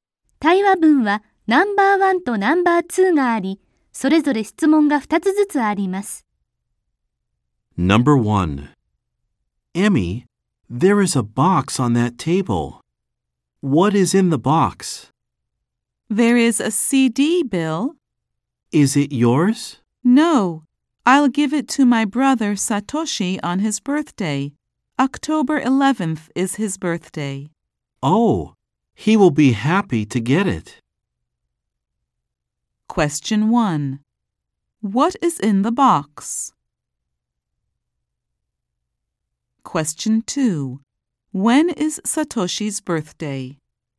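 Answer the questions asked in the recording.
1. A CD.
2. October 11th.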